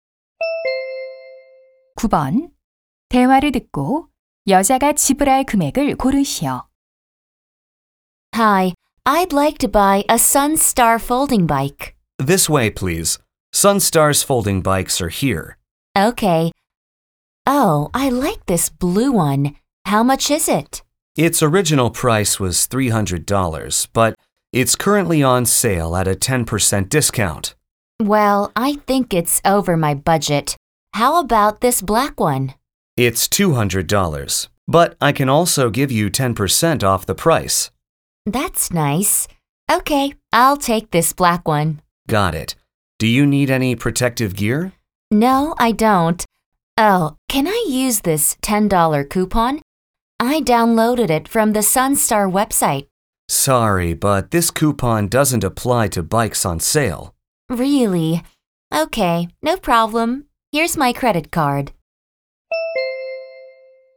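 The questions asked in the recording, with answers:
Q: 대화를 듣고 여자가 지불할 금액을 고르시오.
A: $180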